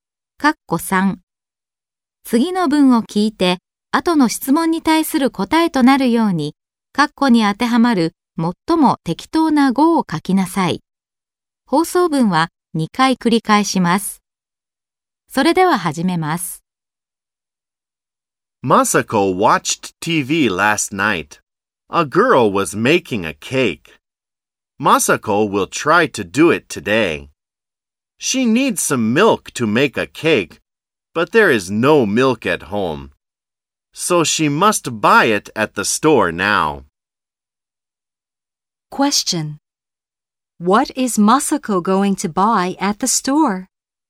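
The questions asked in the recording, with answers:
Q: What is Masako going to buy at the store?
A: Some milk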